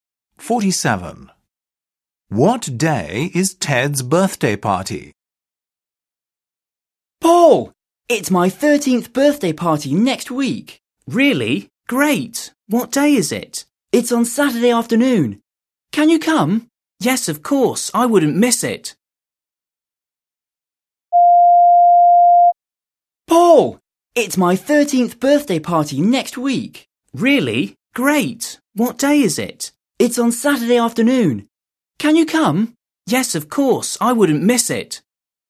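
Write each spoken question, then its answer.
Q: What day is Ted's birthday party?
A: Saturday afternoon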